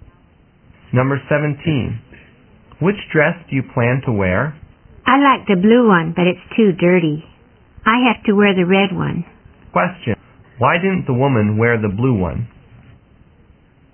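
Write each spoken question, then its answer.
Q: Why didn't the woman wear the blue one?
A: Because it's too dirty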